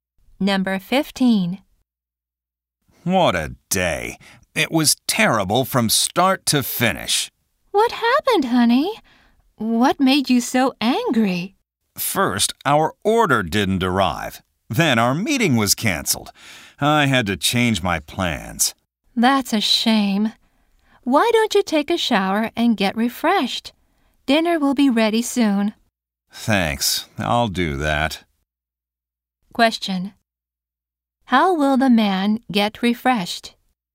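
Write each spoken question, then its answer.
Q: Question. How will the man get refreshed?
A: By taking a shower.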